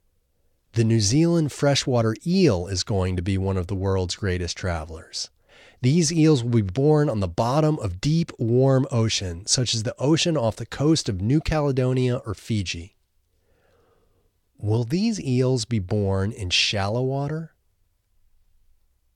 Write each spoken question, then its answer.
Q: Will these eels be born in shallow water?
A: No, these eels won't be born in shallow water.